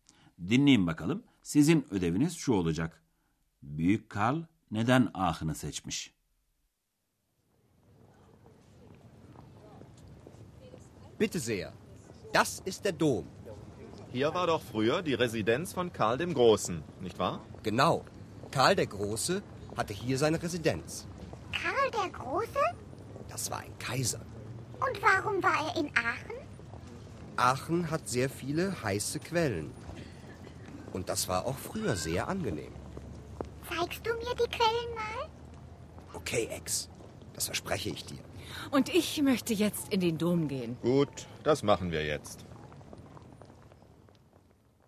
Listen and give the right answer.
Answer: Evet, Büyük Karl buradaki sıcak su kaynakları sağlığına iyi geldiği için ahını seçmiş.